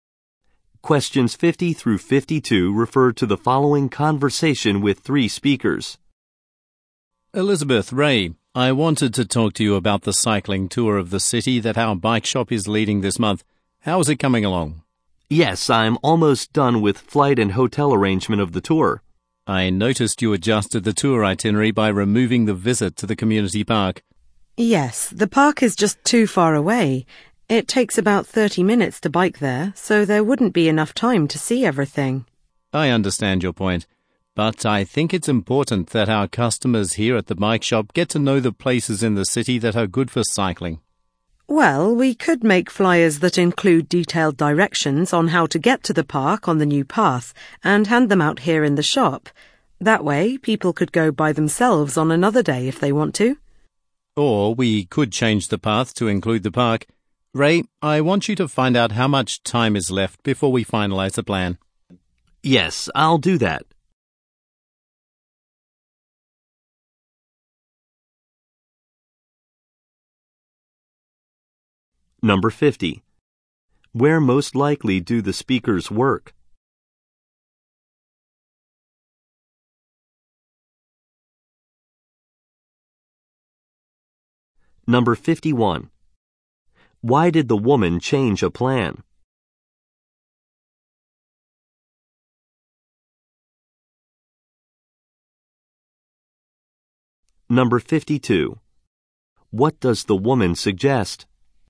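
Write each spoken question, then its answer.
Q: Where most likely do the speakers work?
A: At a bike shop

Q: Why did the woman change a plan?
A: The park was too far away

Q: What does the woman suggest?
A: Making flyers with directions to the park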